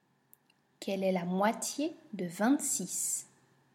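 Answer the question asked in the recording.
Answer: 13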